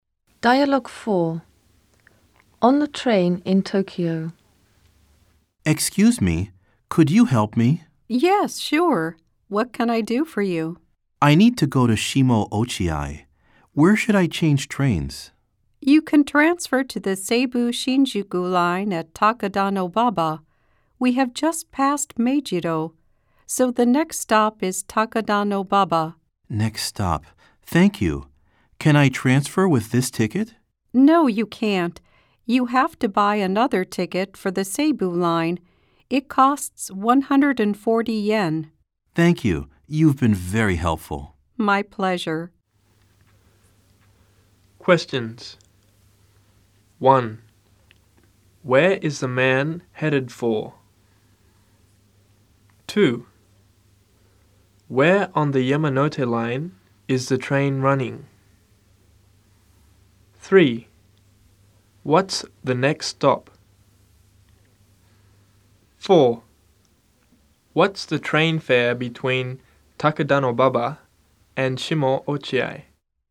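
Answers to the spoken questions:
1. Shimo Ochiai
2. Between Meijido and Takadanobaba
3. Takadanobaba
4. 140 yen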